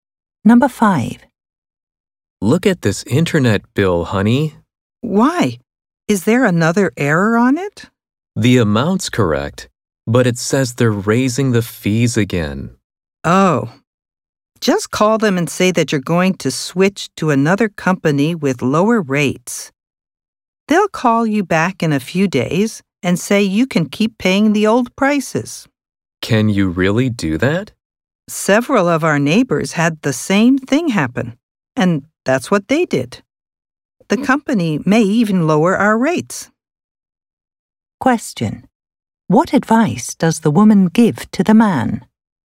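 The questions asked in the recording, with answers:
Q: What advice does the woman give to the man?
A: Call the internet company and say he will switch to another company with lower rates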